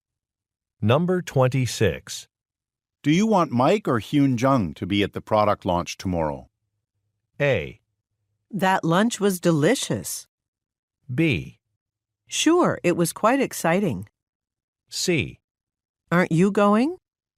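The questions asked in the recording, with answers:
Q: Do you want Mike or Hyun Jung to be at the product launch tomorrow?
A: C: Aren't you going?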